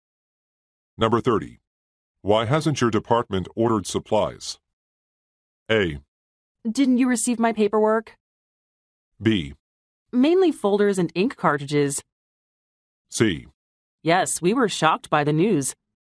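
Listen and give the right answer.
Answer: A: Didn't you receive my paperwork?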